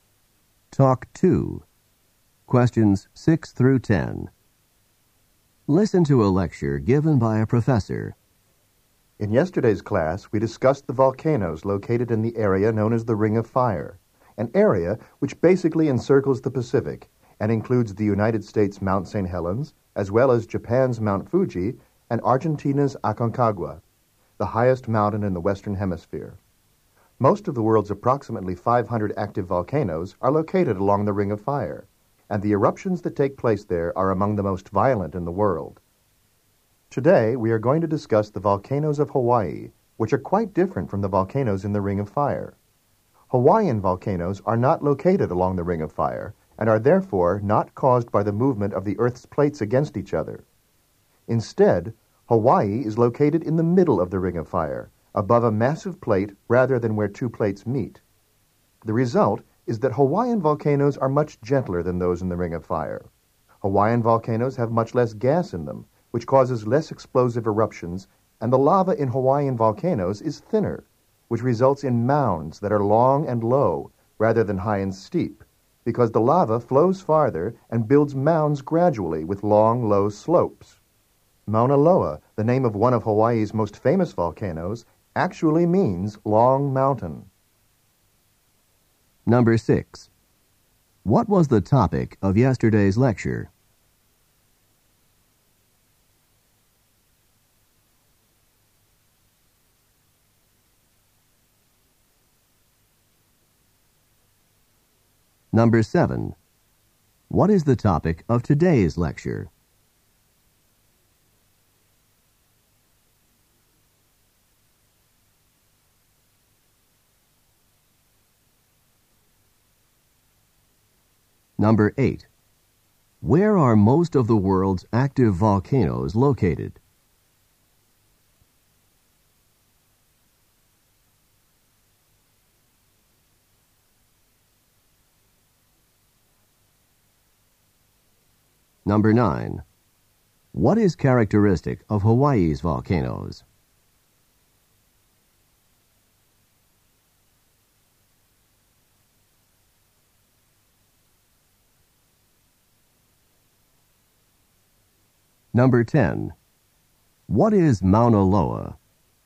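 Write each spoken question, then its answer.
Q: What was the topic of yesterday's lecture?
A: Volcanoes of the Ring of Fire

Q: What is the topic of today's lecture?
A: Volcanoes of Hawaii

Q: Where are most of the world's active volcanoes located?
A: Along the Ring of Fire

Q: What is characteristic of Hawaii's volcanoes?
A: They are gentler, with less gas and thinner lava, forming long, low mounds

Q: What is Mauna Loa?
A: A famous Hawaiian volcano (its name means long mountain)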